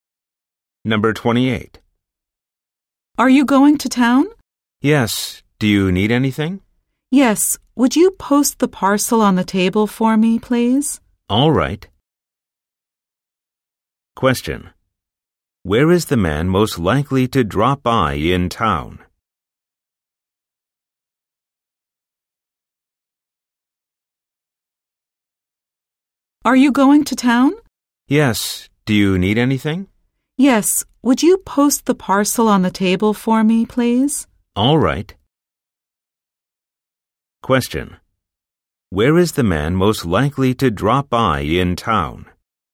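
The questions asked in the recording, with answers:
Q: Where is the man most likely to drop by in town?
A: The post office.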